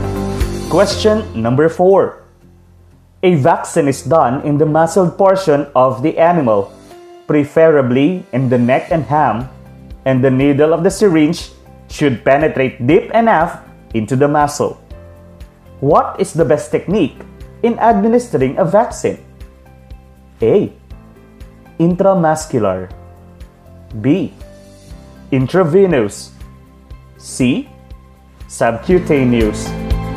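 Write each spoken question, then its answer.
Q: What is the best technique in administering a vaccine?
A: A: Intramuscular.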